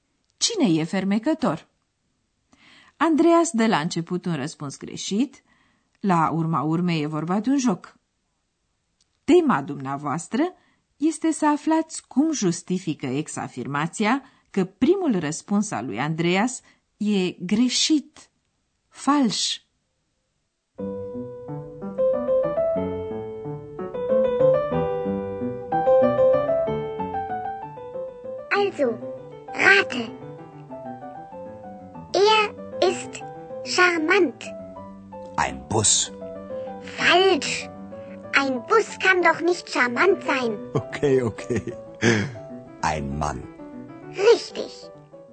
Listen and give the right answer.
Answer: Un autobuz nu poate fi fermecător.